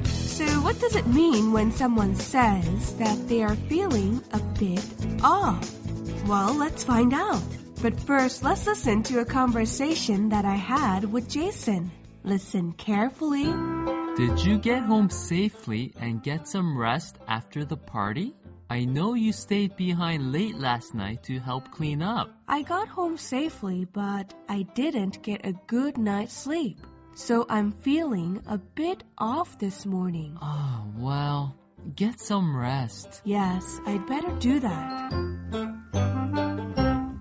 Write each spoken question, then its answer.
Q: What does it mean when someone says that they are feeling a bit off?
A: So if you're feeling off, it means that you're not feeling like yourself and something is not quite right.